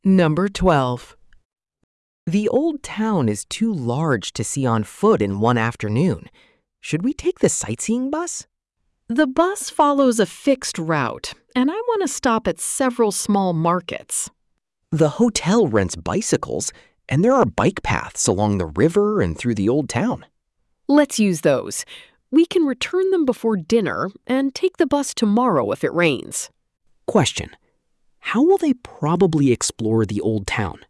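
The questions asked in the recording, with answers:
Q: how will they probably explore the old town?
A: By bicycle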